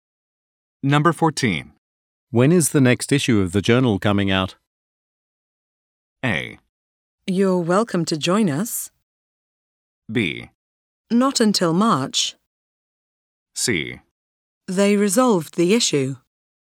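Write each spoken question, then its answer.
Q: When is the next issue of the journal coming out?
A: B: Not until March.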